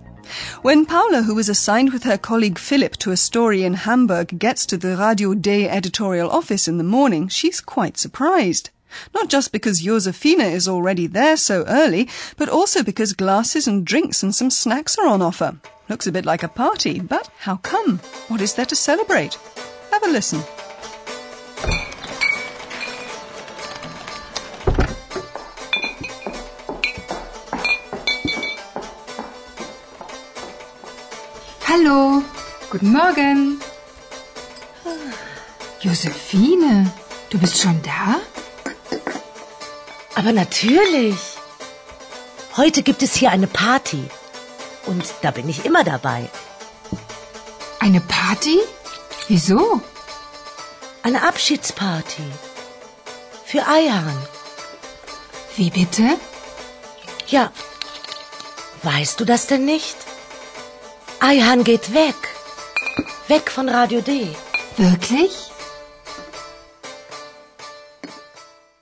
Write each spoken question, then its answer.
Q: What is there to celebrate?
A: The little party you'll have heard is for Ayhan.